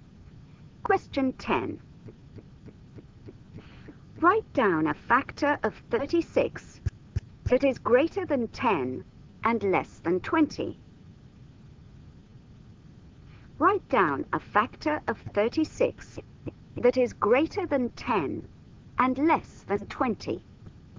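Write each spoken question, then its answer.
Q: Write down a factor of 36 that is greater than 10 and less than 20.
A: 12 or 18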